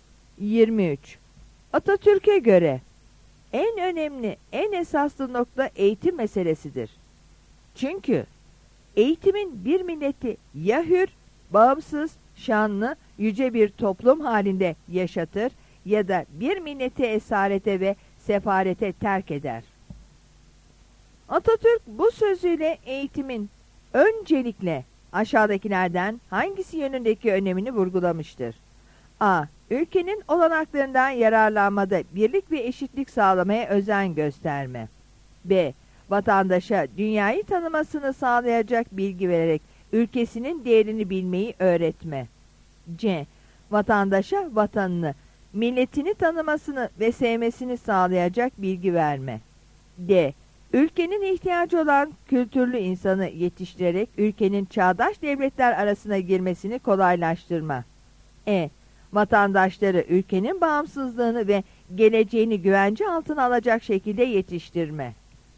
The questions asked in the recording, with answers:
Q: Atatürk bu sözüyle eğitimin öncelikle aşağıdakilerden hangisi yönündeki önemini vurgulamıştır?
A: Yanıt E'dir.